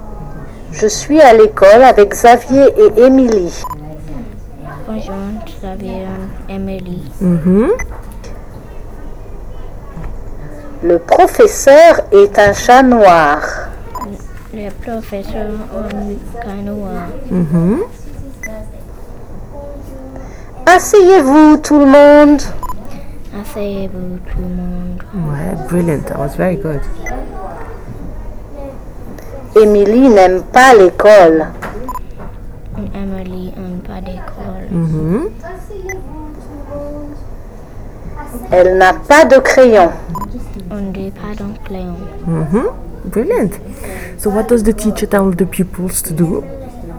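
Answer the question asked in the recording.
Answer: Sit down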